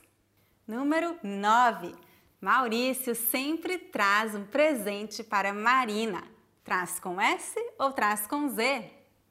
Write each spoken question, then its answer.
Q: Traz com S ou traz com Z?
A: Traz com Z.